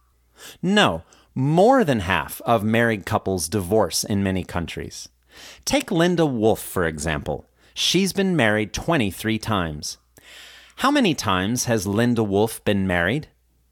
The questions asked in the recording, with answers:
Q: How many times has Linda Wolf been married?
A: Linda Wolf has been married 23 times.